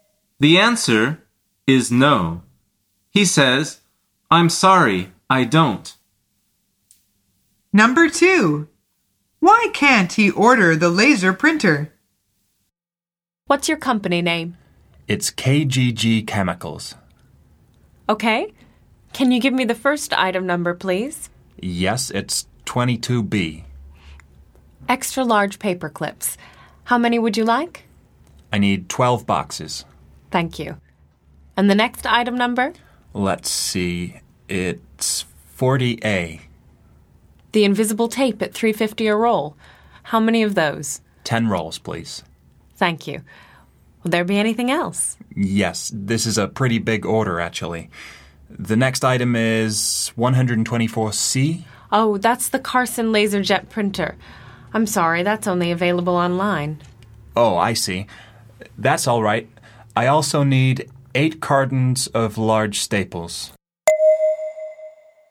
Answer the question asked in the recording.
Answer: The answer is it can't be ordered on the phone.